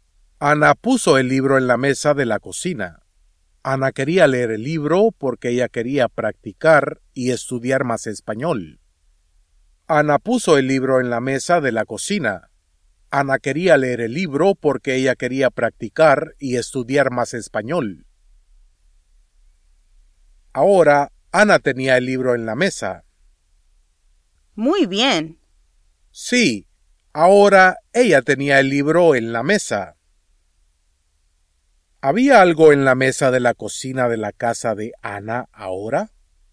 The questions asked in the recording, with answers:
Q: ¿Había algo en la mesa de la cocina de la casa de Ana ahora?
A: Sí, el libro de español estaba en la mesa de la cocina de su casa.